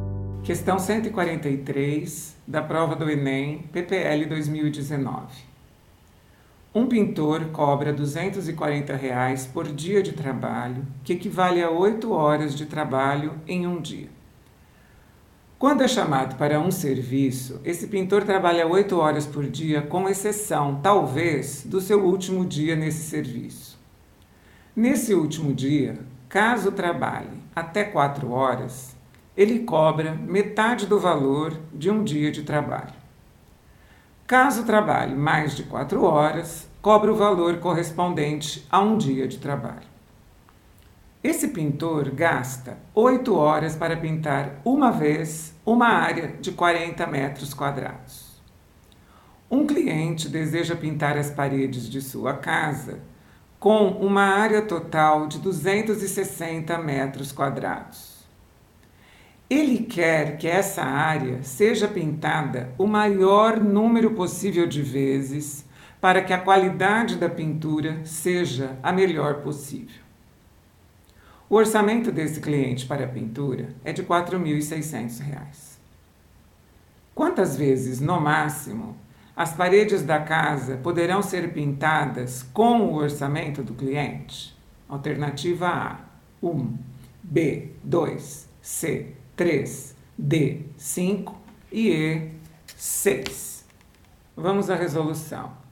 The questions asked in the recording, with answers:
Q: Quantas vezes, no máximo, as paredes da casa poderão ser pintadas com o orçamento do cliente?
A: ficamos com a resposta correspondente à alternativa B